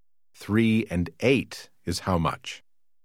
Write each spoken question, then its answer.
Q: Three and eight is how much?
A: 11.